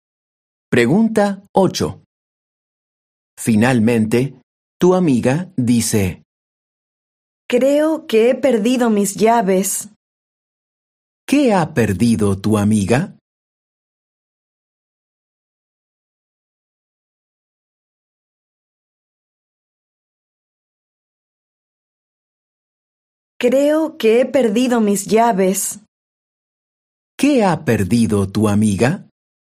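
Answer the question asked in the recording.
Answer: sus llaves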